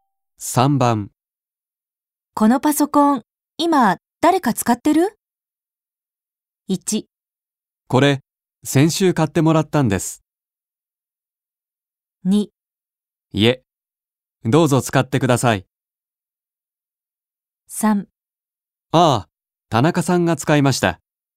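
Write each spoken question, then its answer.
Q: このパソコン、今、誰か使ってる?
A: 2: いえ、どうぞ使ってください。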